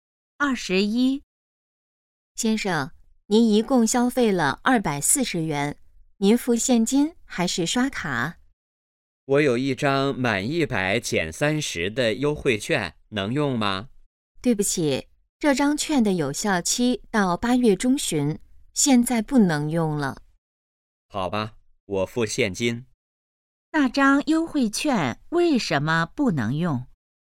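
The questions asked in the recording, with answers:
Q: 那张优惠券为什么不能用?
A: 已经过了有效期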